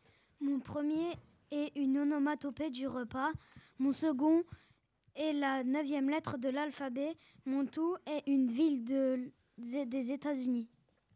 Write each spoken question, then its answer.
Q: Mon tout est une ville des États-Unis.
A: And the answer is Miami.